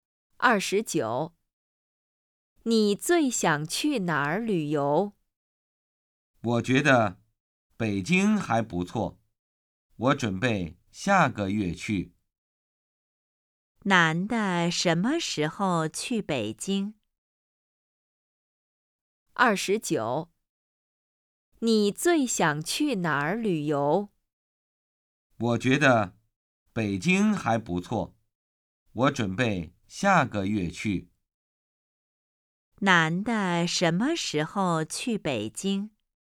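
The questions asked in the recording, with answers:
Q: 男的什么时候去北京?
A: 下个月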